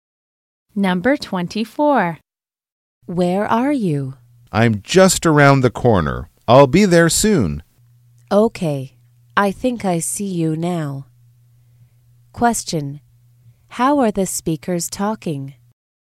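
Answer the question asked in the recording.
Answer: On the phone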